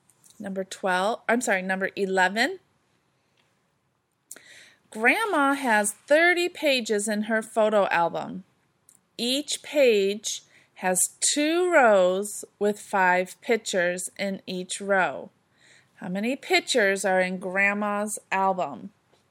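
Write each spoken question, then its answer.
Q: How many pictures are in Grandma's album?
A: 300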